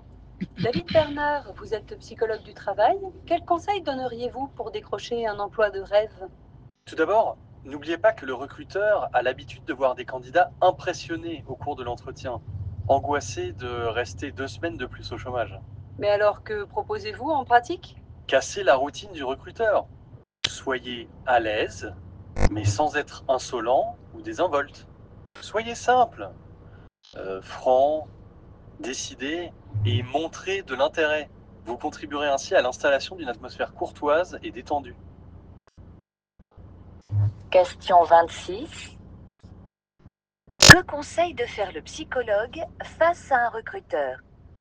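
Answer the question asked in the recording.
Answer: Casser la routine du recruteur : être à l'aise, simple, franc, décidé et montrer de l'intérêt.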